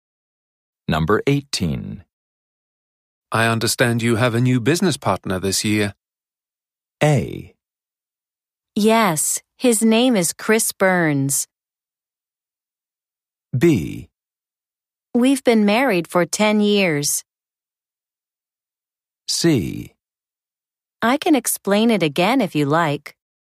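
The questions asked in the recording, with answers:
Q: I understand you have a new business partner this year.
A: A: Yes, his name is Chris Burns.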